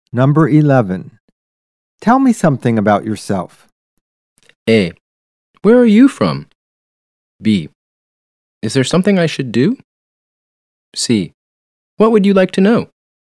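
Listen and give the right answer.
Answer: C: What would you like to know?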